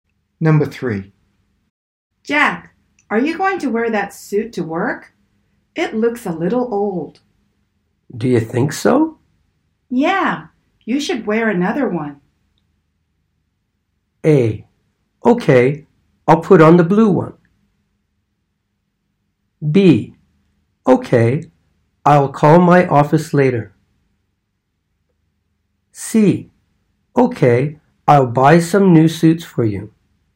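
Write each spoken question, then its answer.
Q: Yeah, you should wear another one.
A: A: Okay, I'll put on the blue one.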